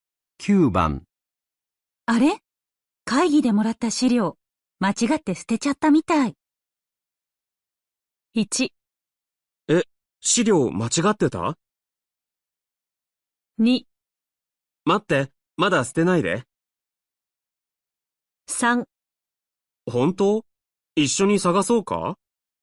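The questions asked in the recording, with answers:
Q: あれ?会議でもらった資料、間違って捨てちゃったみたい。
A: 3: 本当?一緒に探そうか?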